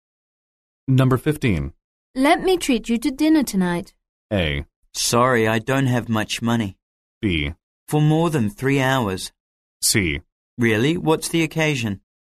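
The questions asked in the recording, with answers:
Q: Let me treat you to dinner tonight.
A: C: Really? What's the occasion?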